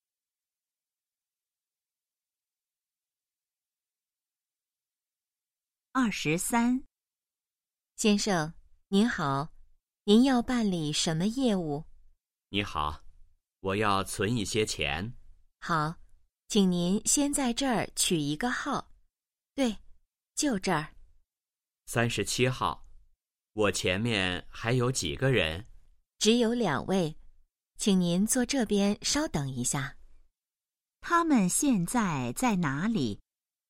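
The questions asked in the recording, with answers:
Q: 他们现在在哪里?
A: 银行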